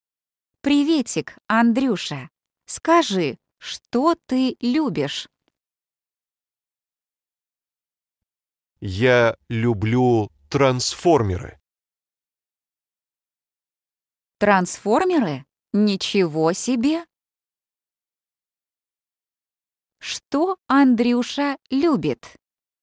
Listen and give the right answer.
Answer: Он любит трансформеры.